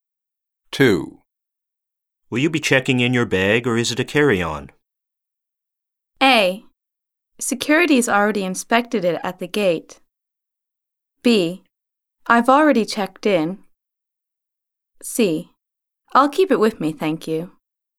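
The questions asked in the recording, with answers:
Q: Will you be checking in your bag or is it a carry-on?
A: C: I'll keep it with me, thank you.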